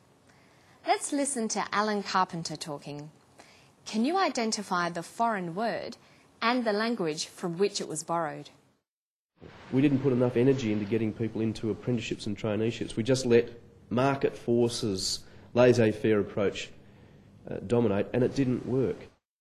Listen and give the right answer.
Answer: Laissez-faire is a borrowing from French.